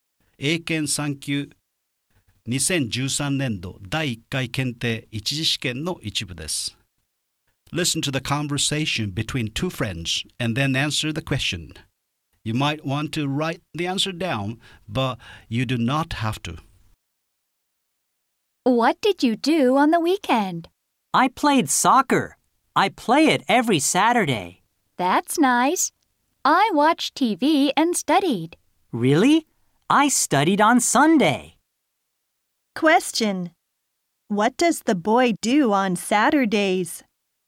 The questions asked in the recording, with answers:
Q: What does the boy do on Saturdays?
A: The answer is the boy plays soccer on Saturdays